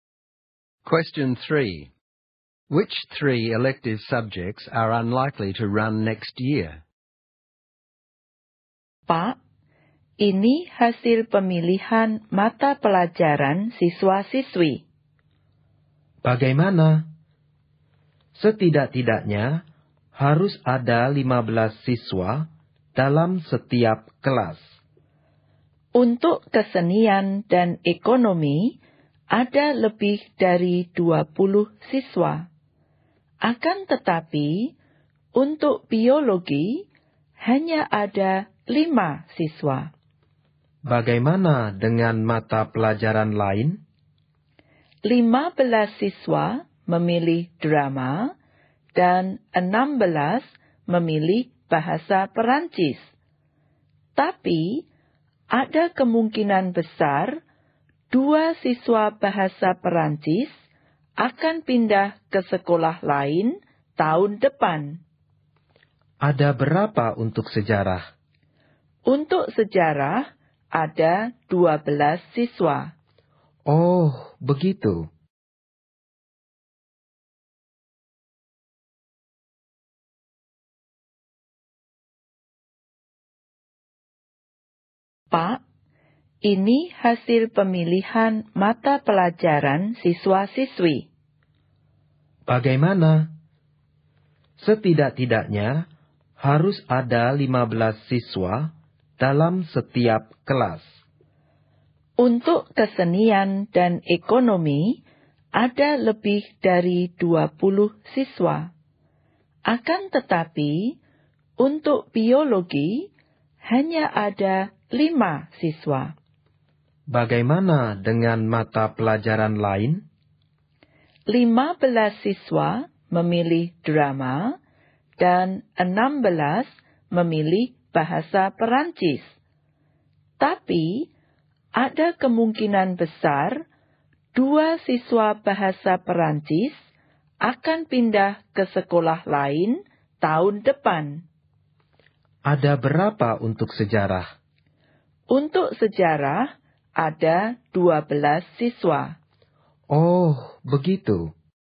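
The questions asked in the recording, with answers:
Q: Which three elective subjects are unlikely to run next year?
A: Biology, history and French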